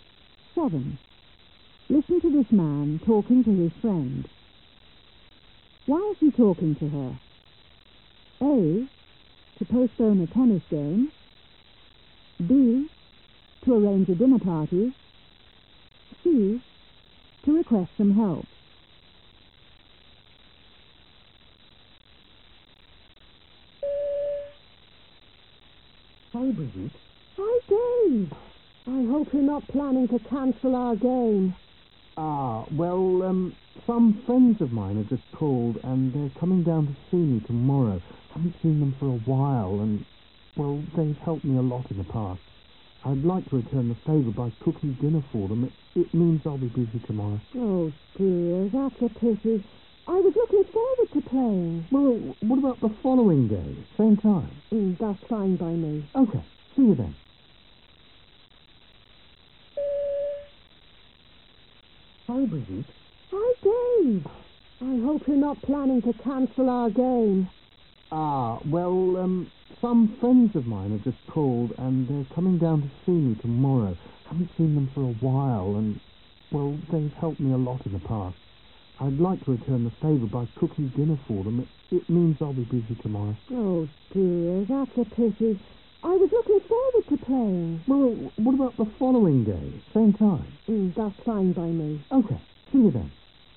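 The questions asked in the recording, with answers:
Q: Why is he talking to her?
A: A: To postpone a tennis game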